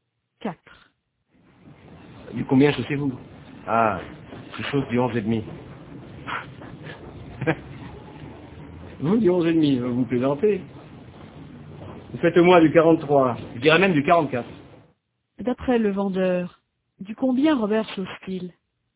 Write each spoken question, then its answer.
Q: D'après le vendeur, du combien Robert chausse-t-il ?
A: Du 43 au moins, peut-être même du 44.